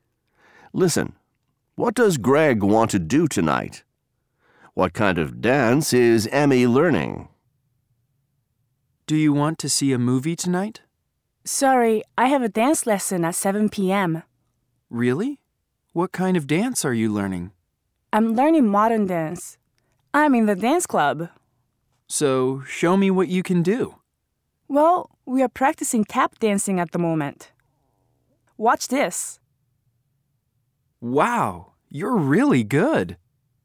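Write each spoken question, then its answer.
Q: What does Greg want to do tonight?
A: See a movie

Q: What kind of dance is Emmy learning?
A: Modern dance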